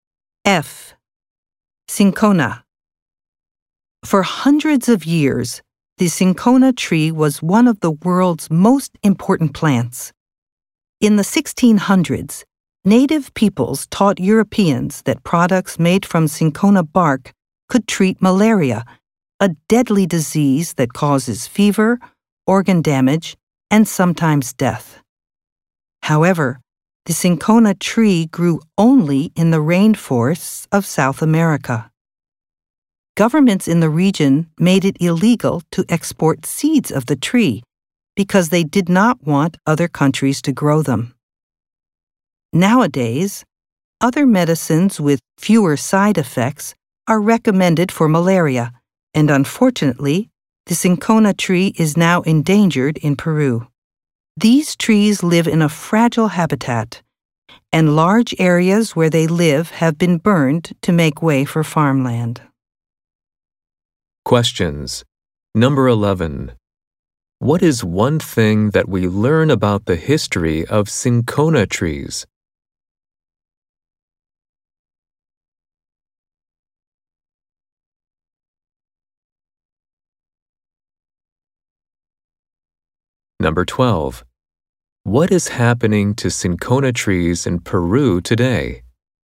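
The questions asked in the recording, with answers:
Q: What is one thing that we learn about the history of cinchona trees?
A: Products made from its bark were used to treat malaria

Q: What is happening to cinchona trees in Peru today?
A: They are becoming endangered as their habitat is burned for farmland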